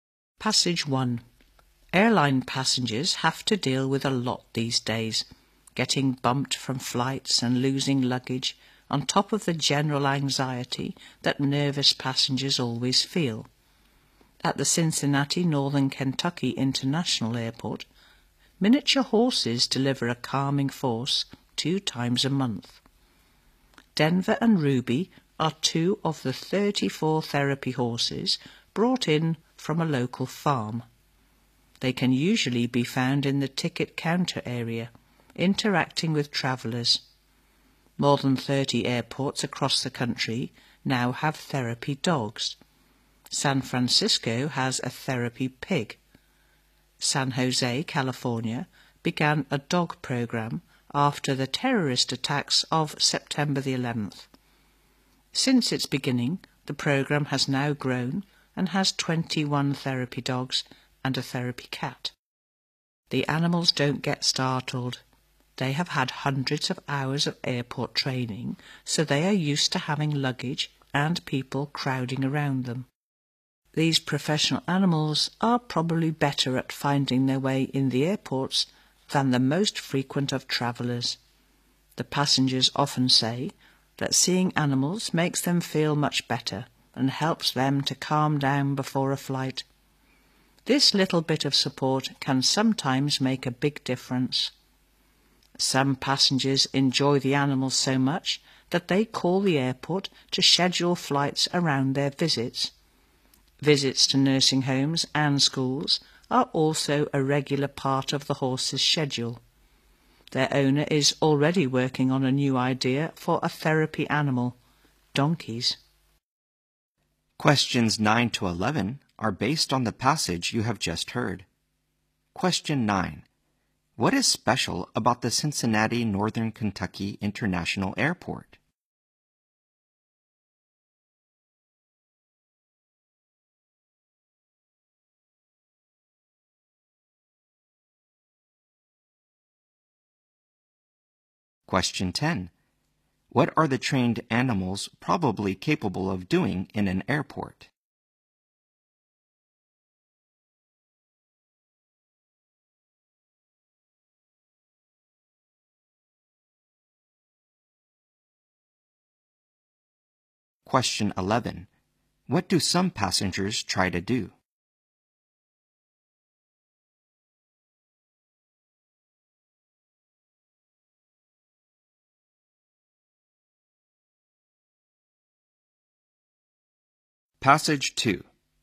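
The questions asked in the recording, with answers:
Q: What is special about the Cincinnati Northern Kentucky International Airport?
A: Miniature therapy horses calm passengers there twice a month

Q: What are the trained animals probably capable of doing in an airport?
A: Finding their way better than most frequent travellers

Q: What do some passengers try to do?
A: Schedule their flights around the animals' visits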